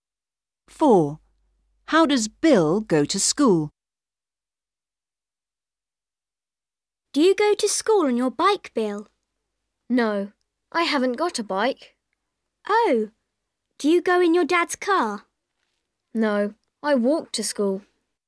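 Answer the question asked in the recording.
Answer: He walks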